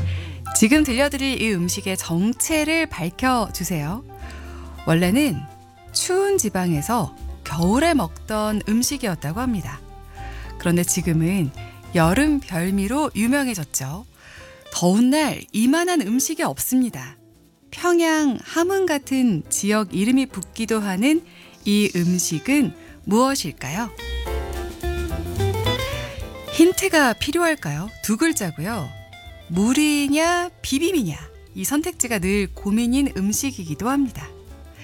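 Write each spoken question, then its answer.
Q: 평양 함흥 같은 지역 이름이 붙기도 하는 이 음식은 무엇일까요?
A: 냉면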